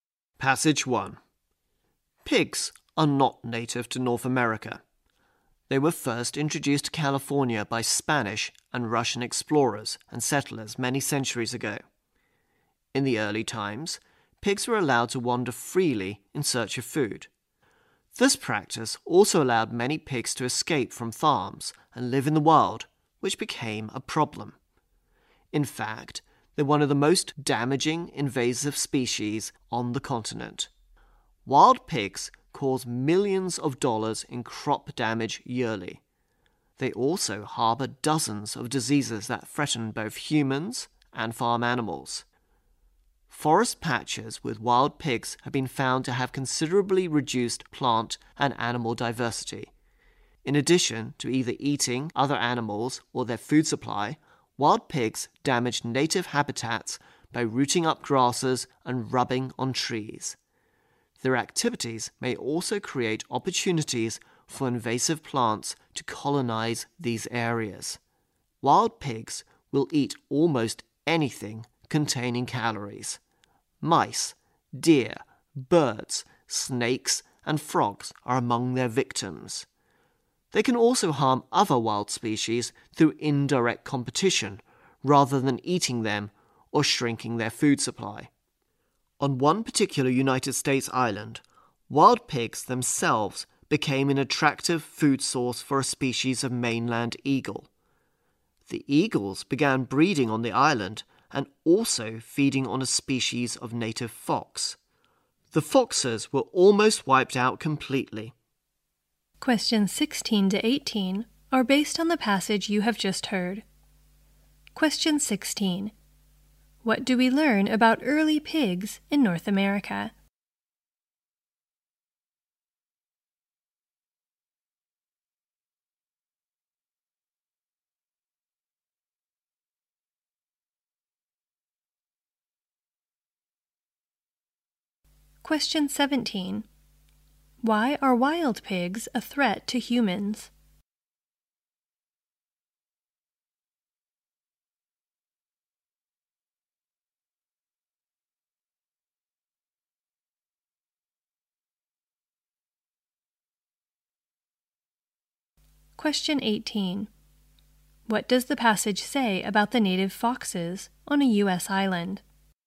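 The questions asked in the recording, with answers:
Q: What do we learn about early pigs in North America?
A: They were allowed to wander freely in search of food

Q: Why are wild pigs a threat to humans?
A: They harbor diseases

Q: What does the passage say about the native foxes on a U.S.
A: They were almost wiped out by eagles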